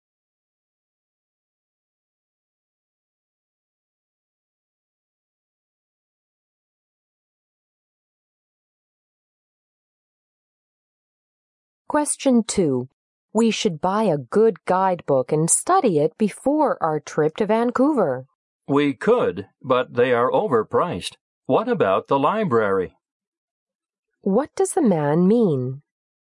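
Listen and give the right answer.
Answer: They could borrow a guidebook from the library instead of buying one.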